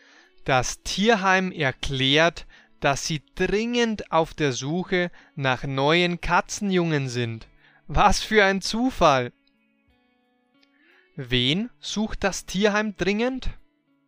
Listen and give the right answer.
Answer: Neue Katzenjungen.